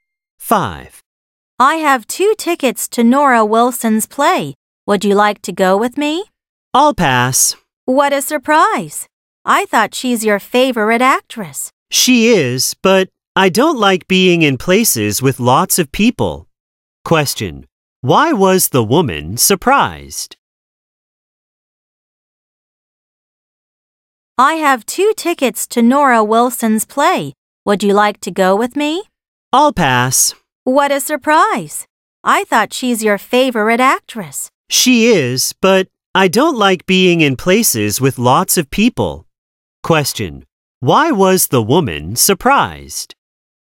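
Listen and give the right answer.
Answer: She thought Nora Wilson was the man's favorite actress, but he didn't want to go.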